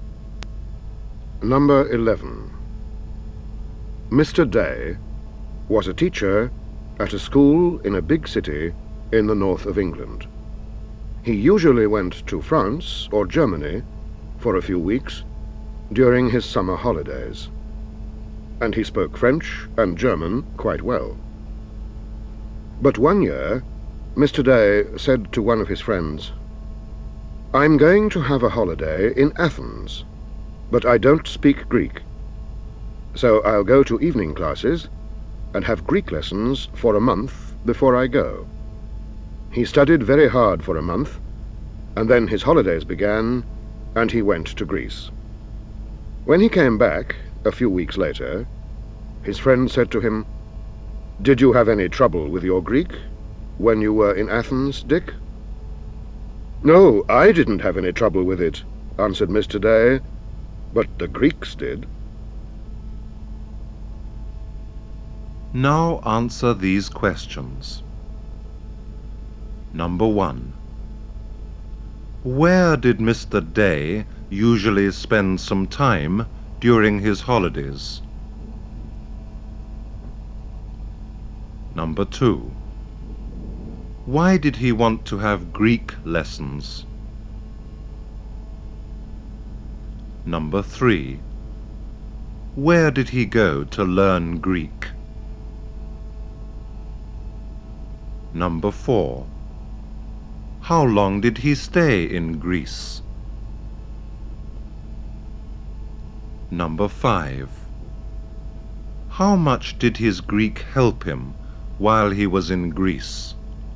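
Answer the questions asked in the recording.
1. In France or Germany
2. Because he was going to Athens and didn't speak Greek
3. To evening classes
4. A few weeks
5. Not much; the Greeks couldn't understand him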